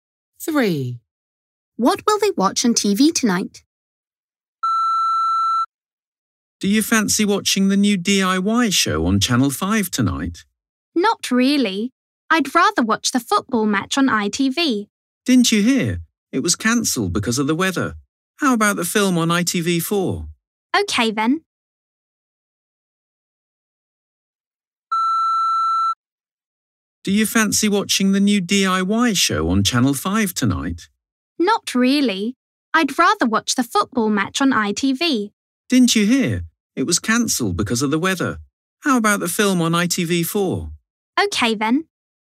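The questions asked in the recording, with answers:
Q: What will they watch on TV tonight?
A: The film on ITV4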